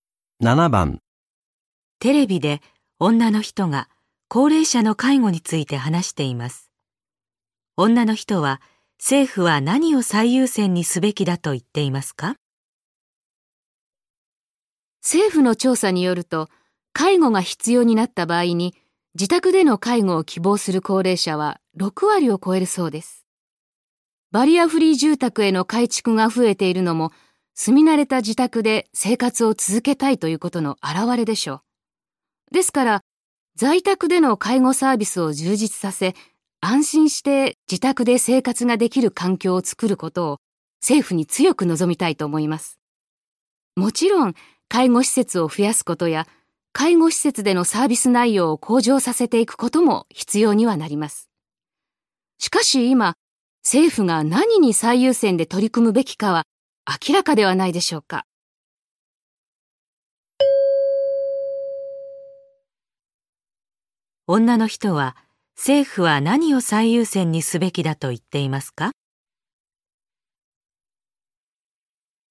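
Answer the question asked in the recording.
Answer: 在宅での介護サービスを充実させること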